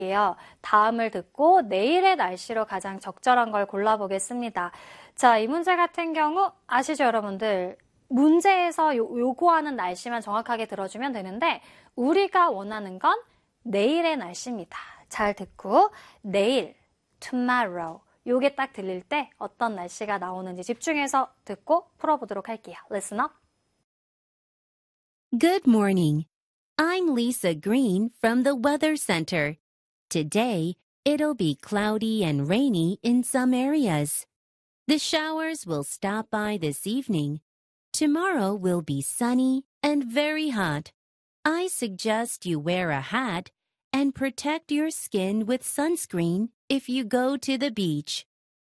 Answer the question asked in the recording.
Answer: will be sunny and very hot 이렇게 이어지니까 sunny 화창하고 매우 덥겠습니다.